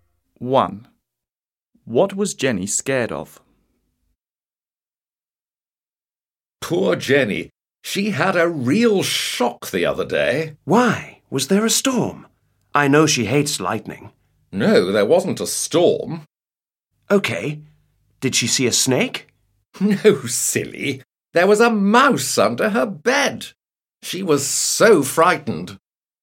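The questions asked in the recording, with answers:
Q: What was Jenny scared of?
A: a mouse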